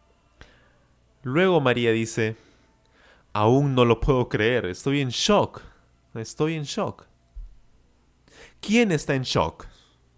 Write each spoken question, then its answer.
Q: ¿Quién está en shock?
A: María, María está en shock.